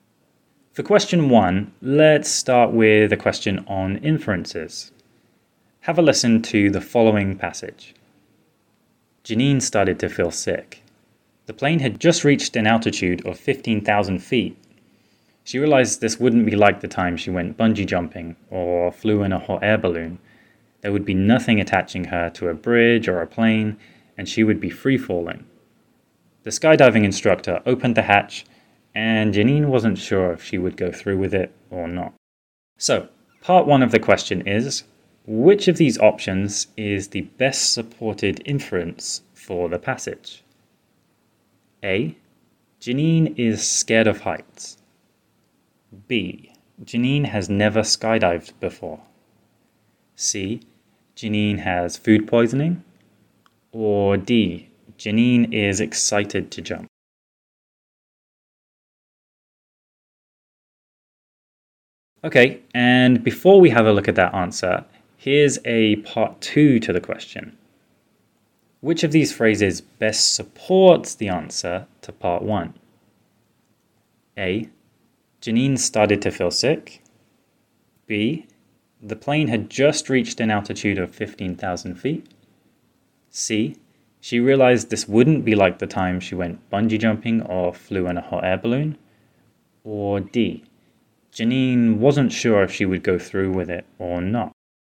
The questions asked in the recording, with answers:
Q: So, part one of the question is, which of these options is the best supported inference for the passage?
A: So, by process of elimination, we can say that answer B is the best supported inference here.

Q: Which of these phrases best supports the answer to part one?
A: That would be, she realized this wouldn't be like the time she went bungee jumping or flew in a hot air balloon.